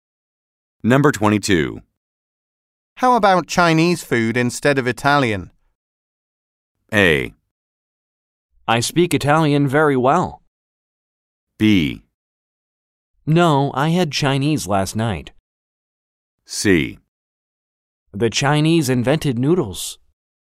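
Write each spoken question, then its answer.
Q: How about Chinese food instead of Italian?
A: B: No, I had Chinese last night.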